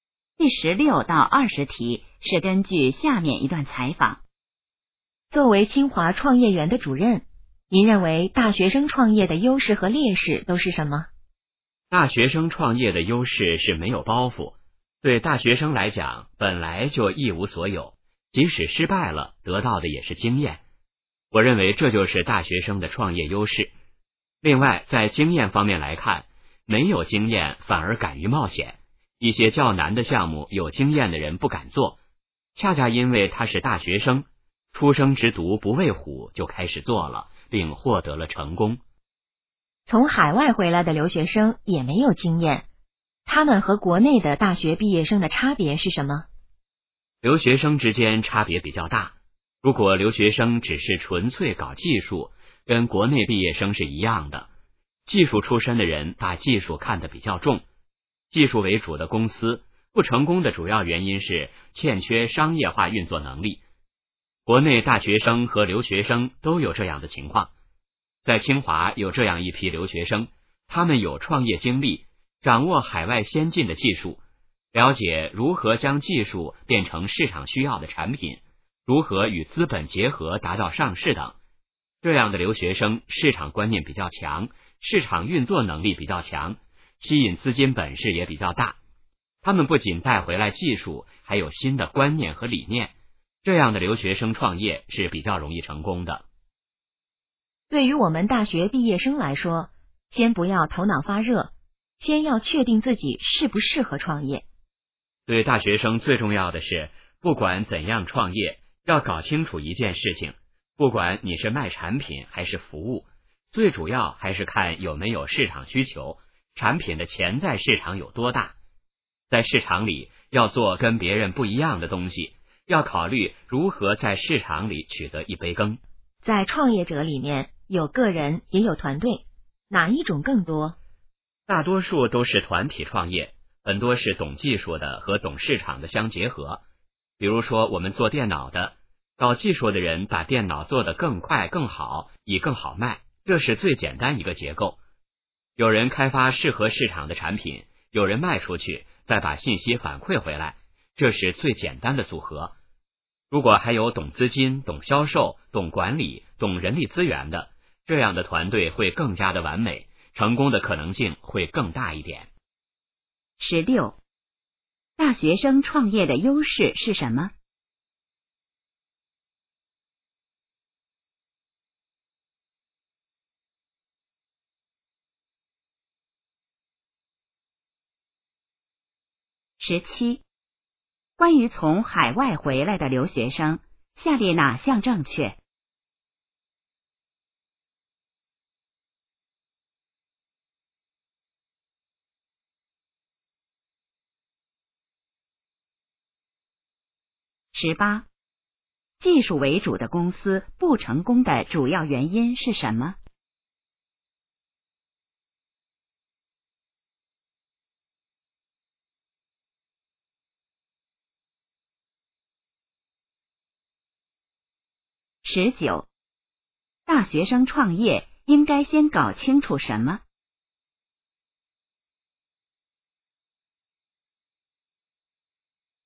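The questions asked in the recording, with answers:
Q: 大学生创业的优势是什么?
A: 没有包袱,失败了也能得到经验;没有经验反而敢于冒险

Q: 技术为主的公司不成功的主要原因是什么?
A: 欠缺商业化运作能力

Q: 大学生创业应该先搞清楚什么?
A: 有没有市场需求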